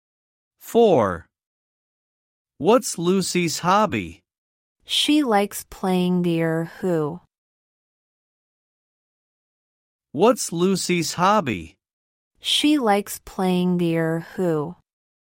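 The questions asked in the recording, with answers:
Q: What's Lucy's hobby?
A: Playing the Erhu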